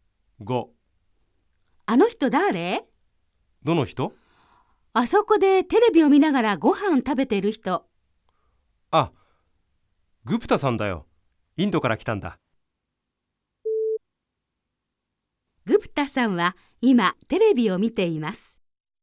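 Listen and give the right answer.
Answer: ○(正しい)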